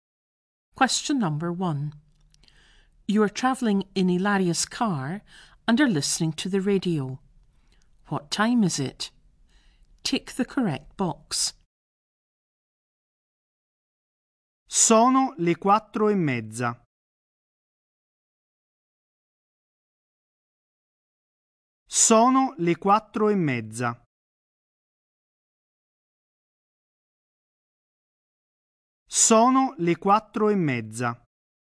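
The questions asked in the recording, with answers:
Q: What time is it?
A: 4:30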